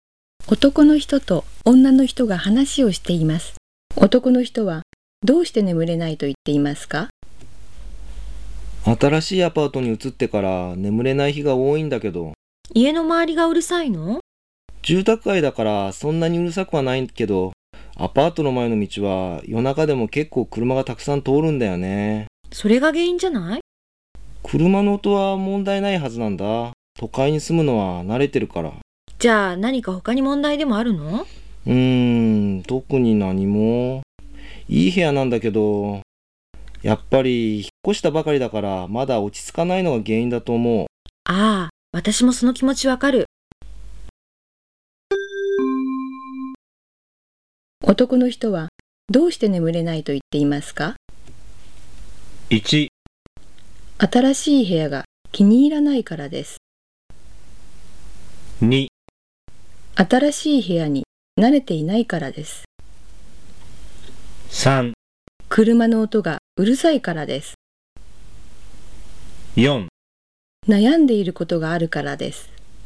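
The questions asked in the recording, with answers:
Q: 男の人はどうして眠れないと言っていますか?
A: 2: 新しい部屋に慣れていないからです。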